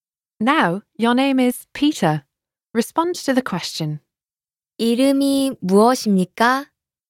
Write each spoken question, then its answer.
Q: 이름이 무엇입니까?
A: 제 이름은 피터입니다.